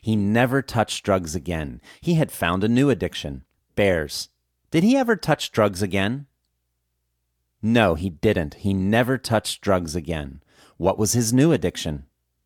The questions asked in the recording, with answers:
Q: What was his new addiction?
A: His new addiction was bears.